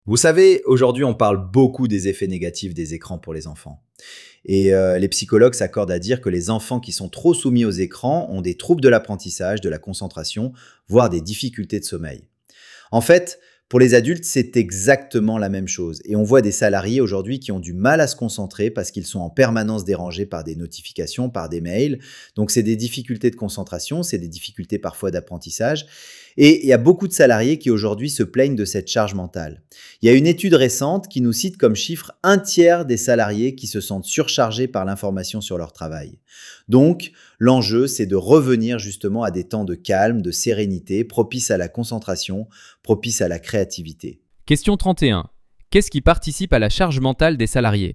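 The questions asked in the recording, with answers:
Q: Qu'est-ce qui participe à la charge mentale des salariés ?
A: Les notifications et les mails qui les dérangent en permanence (surcharge d'information)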